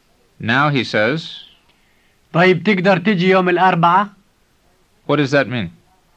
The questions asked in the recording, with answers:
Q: What does that mean?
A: It means, okay, can you come on Wednesday?